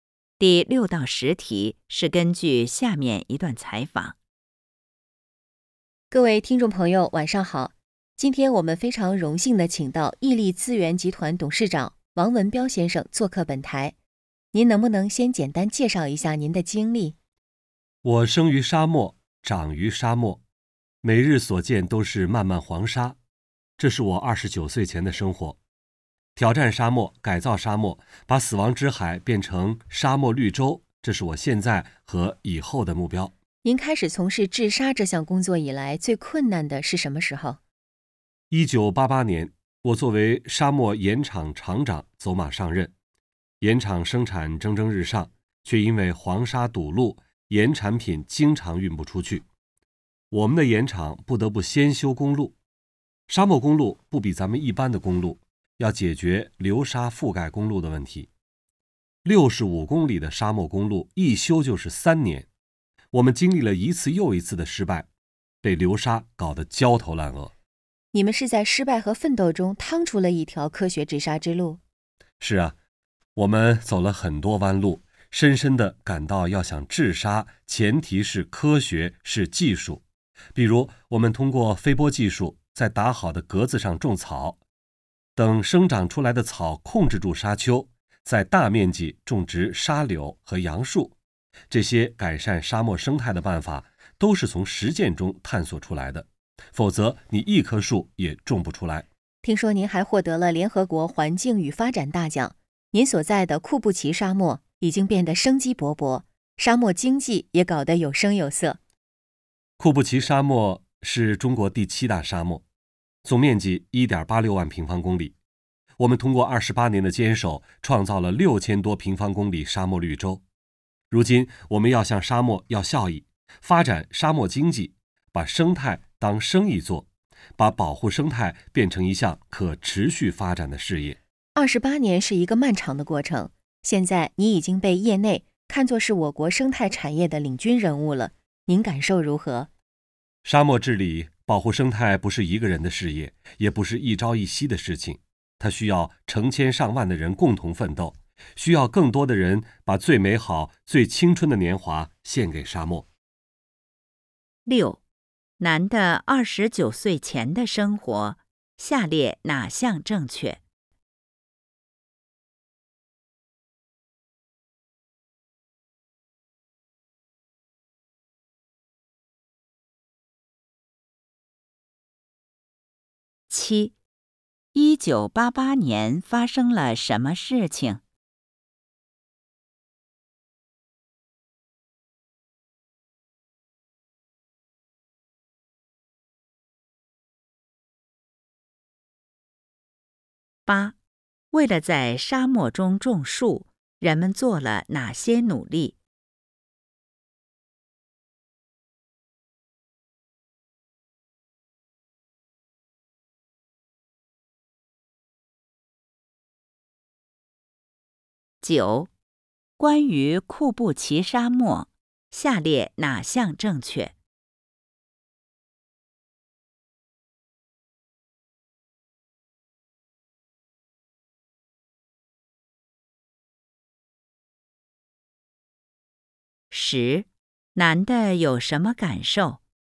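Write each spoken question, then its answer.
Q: 1988年发生了什么事情?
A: 他当上了沙漠盐场厂长(盐场因黄沙堵路不得不修公路)

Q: 为了在沙漠中种树,人们做了哪些努力?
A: 用飞播技术在格子上种草控制沙丘,再大面积种沙柳和杨树

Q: 男的有什么感受?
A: 治沙不是一个人的事业,需要成千上万的人共同奋斗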